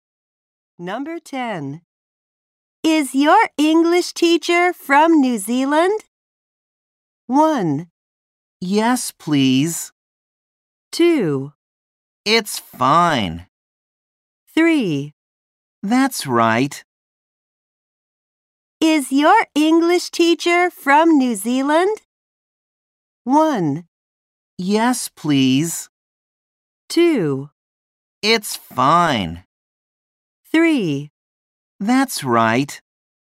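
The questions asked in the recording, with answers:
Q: Is your English teacher from New Zealand?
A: 3: That's right.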